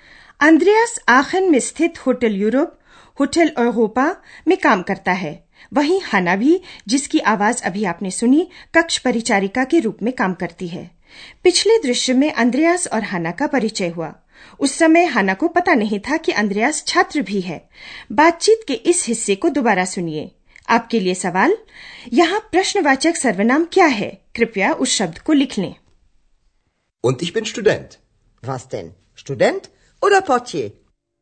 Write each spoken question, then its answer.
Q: यहाँ प्रश्नवाचक सर्वनाम क्या है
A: प्रश्नवाचक सर्वनाम क्या वस